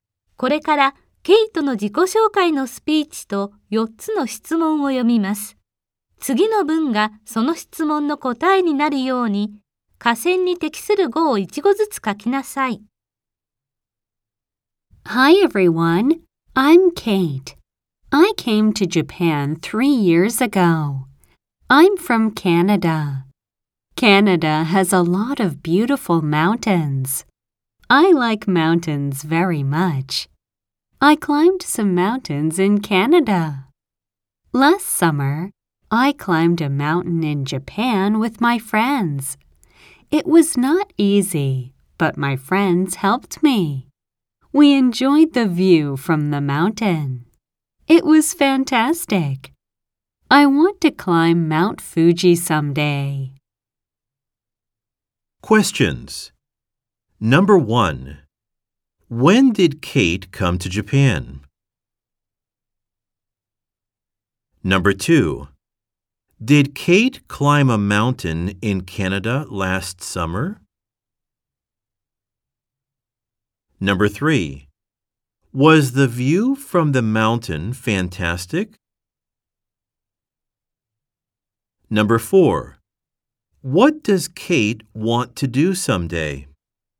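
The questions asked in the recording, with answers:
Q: When did Kate come to Japan?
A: Three years ago.

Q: Did Kate climb a mountain in Canada last summer?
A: No, she didn't.

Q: Was the view from the mountain fantastic?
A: Yes, it was.

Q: What does Kate want to do someday?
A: She wants to climb Mount Fuji.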